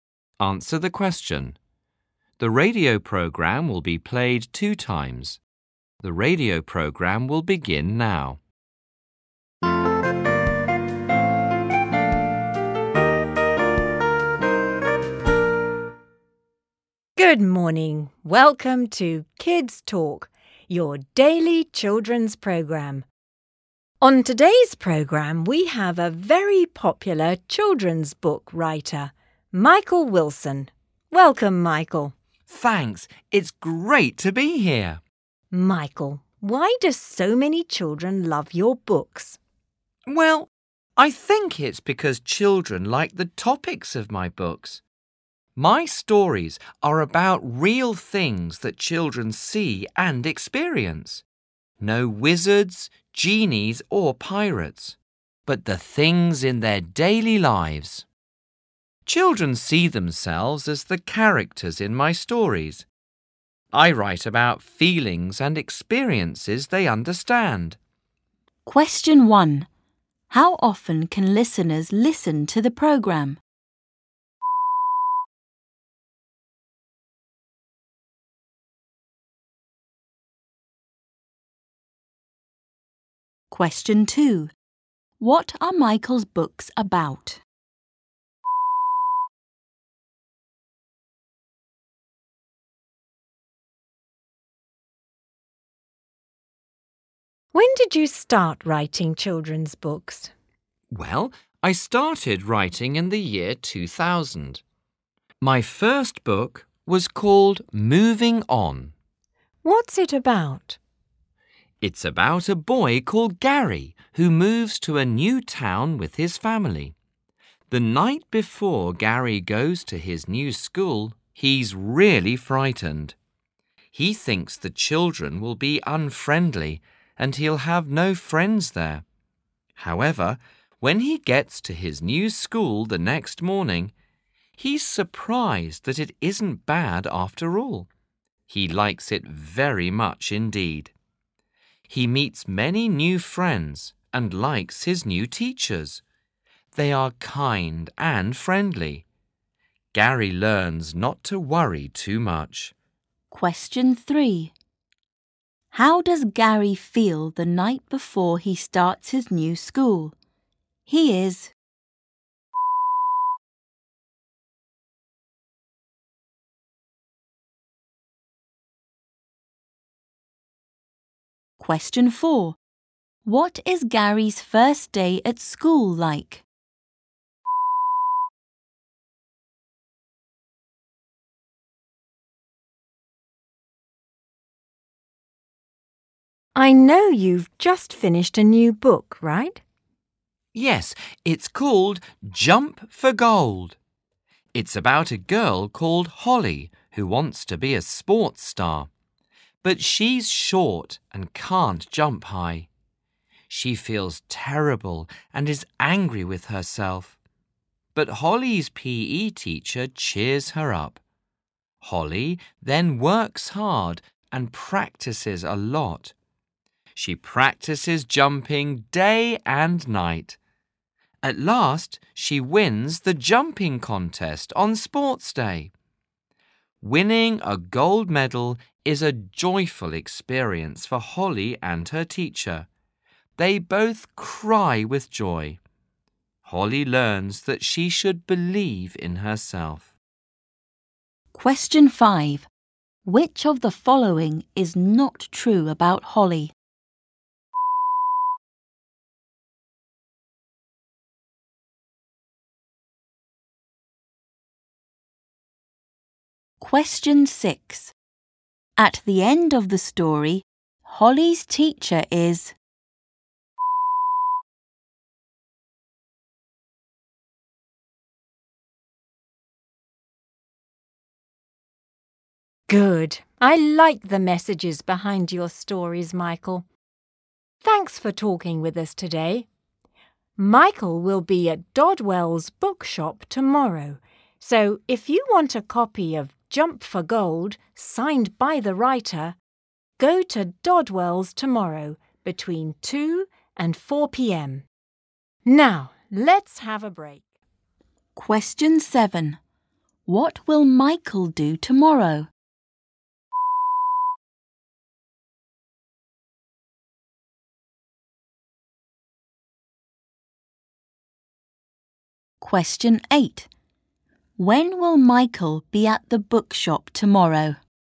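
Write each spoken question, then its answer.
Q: How often can listeners listen to the program?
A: Every day (it's a daily program)

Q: What are Michael's books about?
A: Real things in children's daily lives

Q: How does Gary feel the night before he starts his new school?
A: Frightened

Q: What is Gary's first day at school like?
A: Not bad; he likes it very much and makes new friends

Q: At the end of the story, Holly's teacher is...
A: Crying with joy

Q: What will Michael do tomorrow?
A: Sign copies of Jump for Gold at Dodwell's bookshop

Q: When will Michael be at the bookshop tomorrow?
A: Between 2 and 4pm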